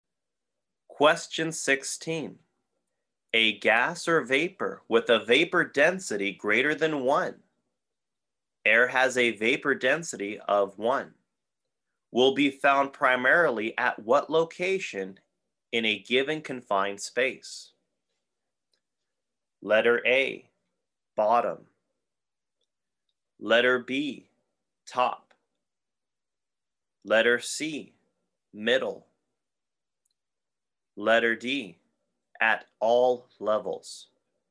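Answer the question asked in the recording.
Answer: A: bottom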